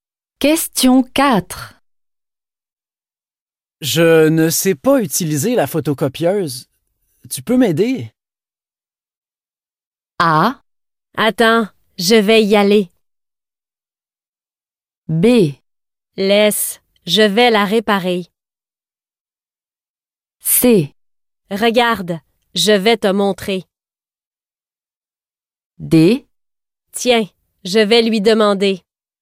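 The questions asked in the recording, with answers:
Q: Je ne sais pas utiliser la photocopieuse. Tu peux m'aider?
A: C: Regarde, je vais te montrer.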